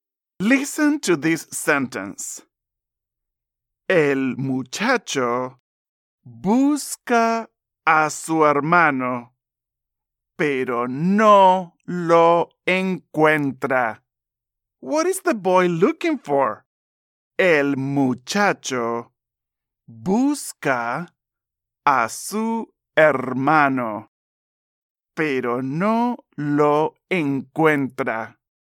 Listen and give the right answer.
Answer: Excelente! His brother.